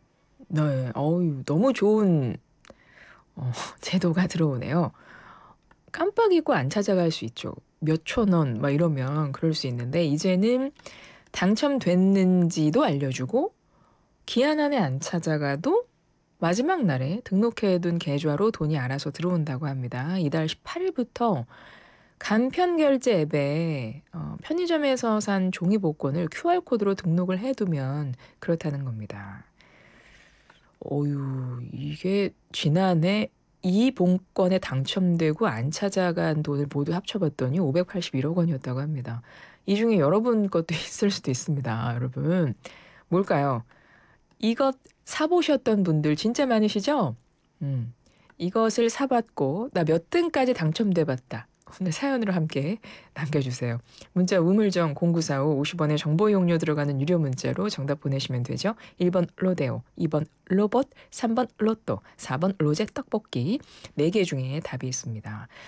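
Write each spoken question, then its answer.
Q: 이 중에 여러분 것도 있을 수도 있습니다. 여러분, 뭘까요?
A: 3: 로또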